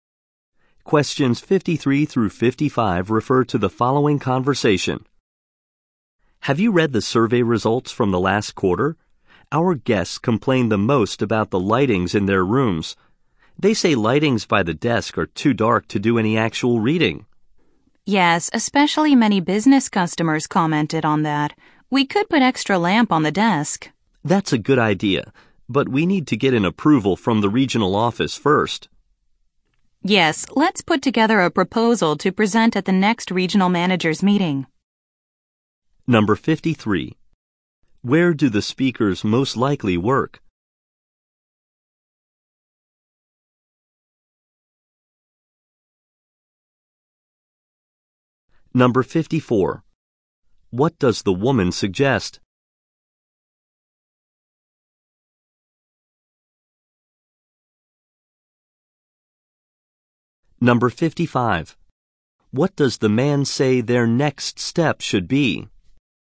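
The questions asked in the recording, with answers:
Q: Where do the speakers most likely work?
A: At a hotel.

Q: What does the woman suggest?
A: Putting an extra lamp on the desks.

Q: What does the man say their next step should be?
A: Prepare a proposal for the regional managers' meeting.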